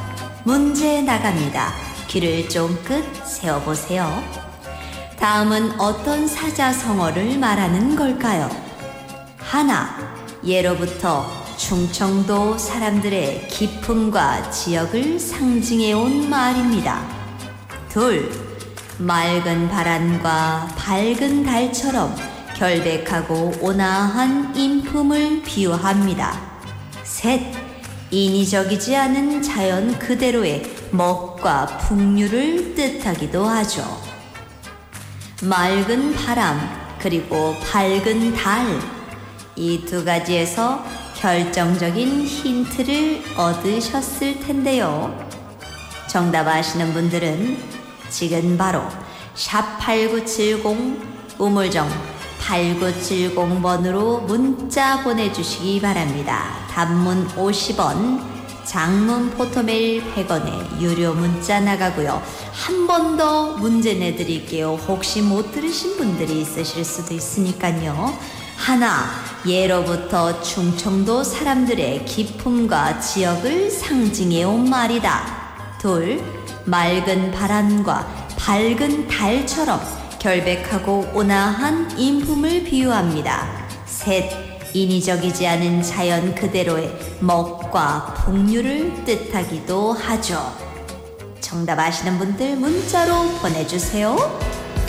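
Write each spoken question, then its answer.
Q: 다음은 어떤 사자성어를 말하는 걸까요?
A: 청풍명월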